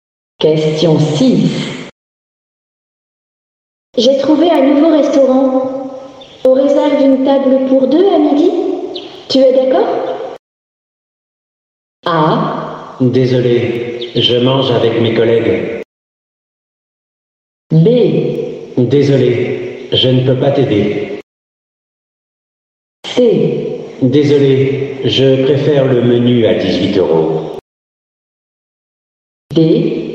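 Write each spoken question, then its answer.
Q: Tu es d'accord?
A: A: Désolé, je mange avec mes collègues.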